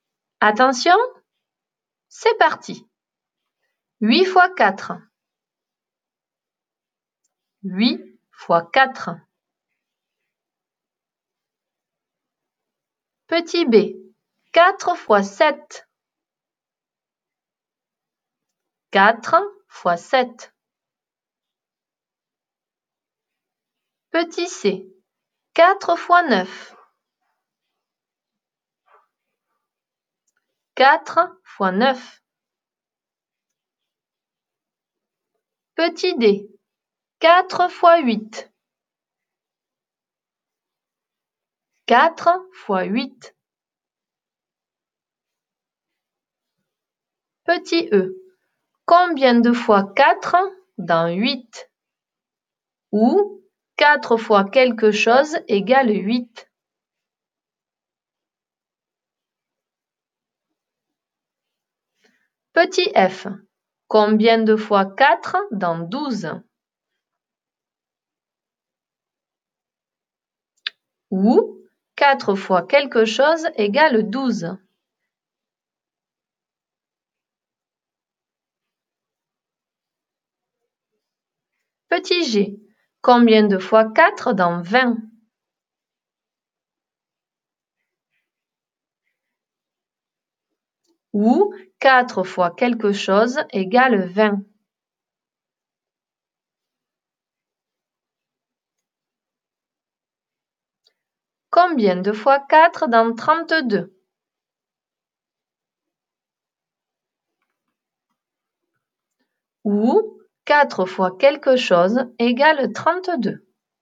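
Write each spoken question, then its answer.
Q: 8 fois 4.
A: 32

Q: 4 fois 7.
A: 28

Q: 4 fois 9.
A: 36

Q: 4 fois 8.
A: 32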